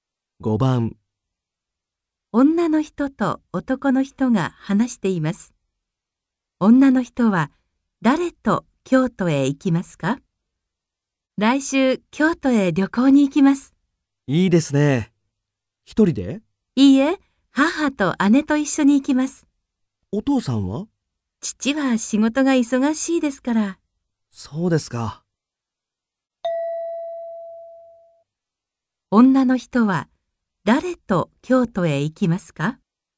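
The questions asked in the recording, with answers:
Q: 女の人は誰と京都へ行きますか?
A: 母と姉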